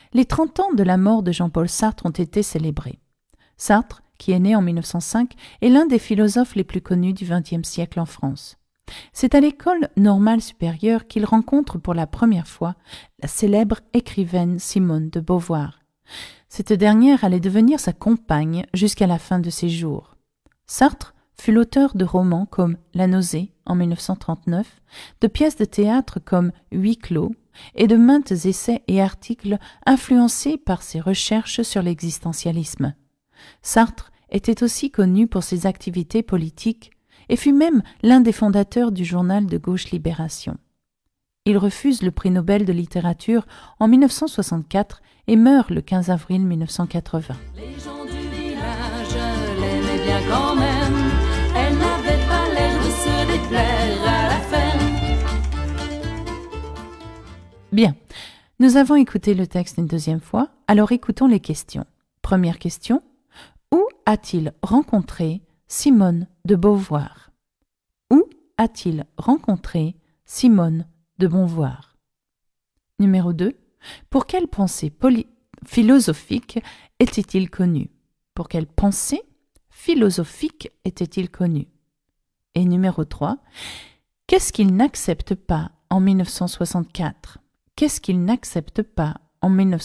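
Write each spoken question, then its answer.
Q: Où a-t-il rencontré Simone de Beauvoir?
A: À l'École normale supérieure

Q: Pour quelle pensée philosophique était-il connu?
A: L'existentialisme

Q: Qu'est-ce qu'il n'accepte pas en 1964?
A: Le prix Nobel de littérature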